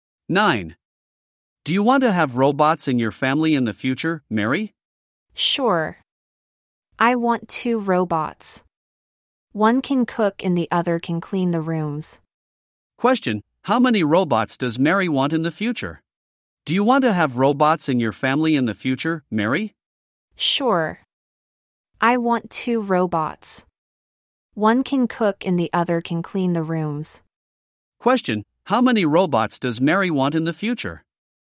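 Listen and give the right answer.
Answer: Two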